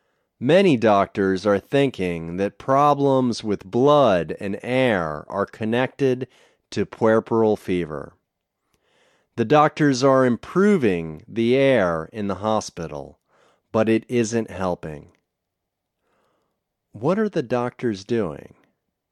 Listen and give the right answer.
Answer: They are improving the air in the hospital.